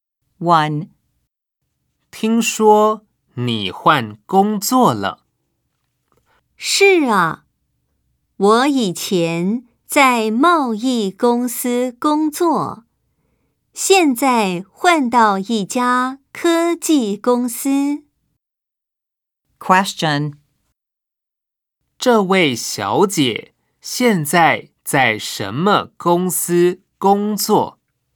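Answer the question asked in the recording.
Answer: 科技公司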